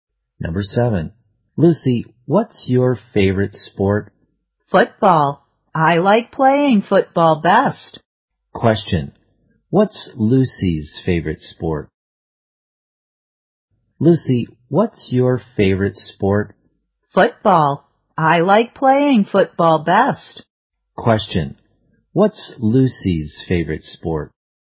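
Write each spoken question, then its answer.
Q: what's Lucy's favorite sport?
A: Football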